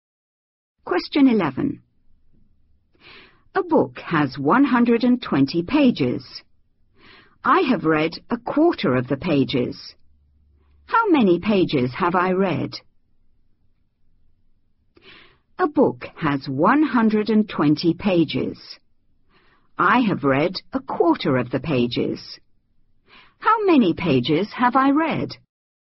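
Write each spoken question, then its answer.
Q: How many pages have I read?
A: 30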